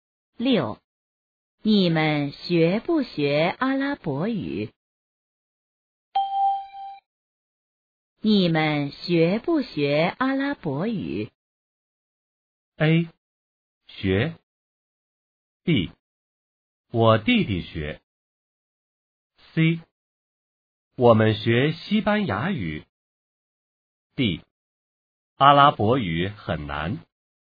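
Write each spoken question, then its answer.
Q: 你们学不学阿拉伯语?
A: A: 学。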